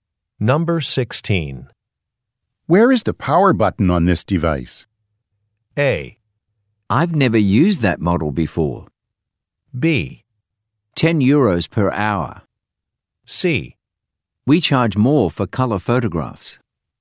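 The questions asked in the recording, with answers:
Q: Where is the power button on this device?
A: A: I've never used that model before.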